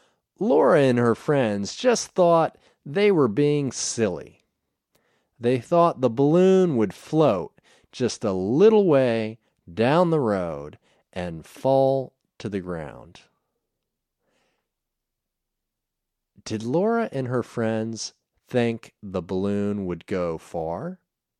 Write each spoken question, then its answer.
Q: Did Laura and her friends think the balloon would go far?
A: No, they didn't think it would go far.